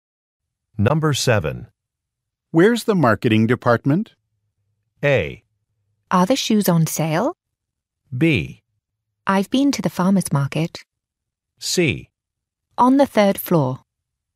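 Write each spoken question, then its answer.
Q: Where's the marketing department?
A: C: On the 3rd floor.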